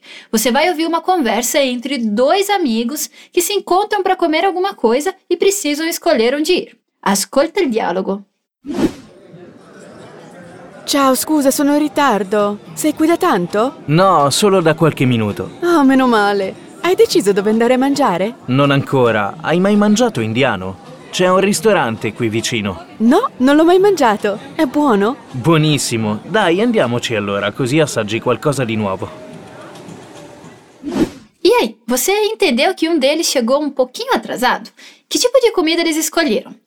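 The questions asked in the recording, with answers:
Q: Que tipo de comida eles escolheram?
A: Comida indiana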